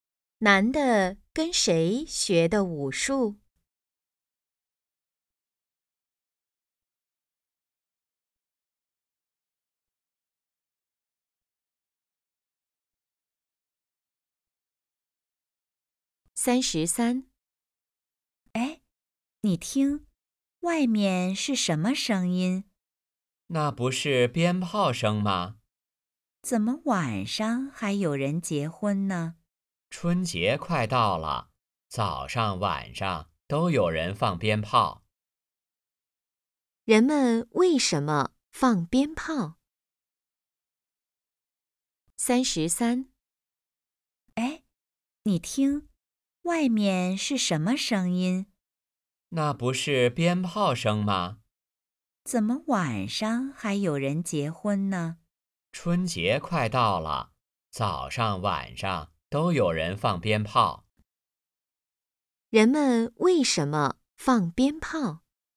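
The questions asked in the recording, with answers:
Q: 人们为什么放鞭炮?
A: 春节快到了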